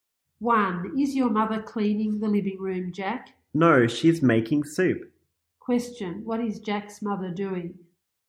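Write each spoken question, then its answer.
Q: What is Jack's mother doing?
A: Making soup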